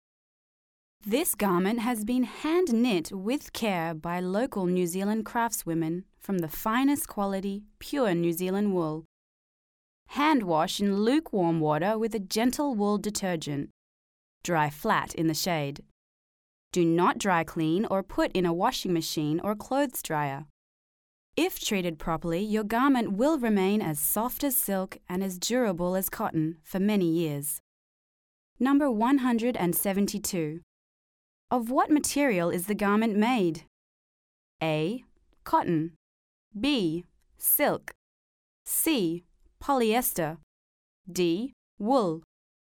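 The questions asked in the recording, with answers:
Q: Of what material is the garment made?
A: D: Wool.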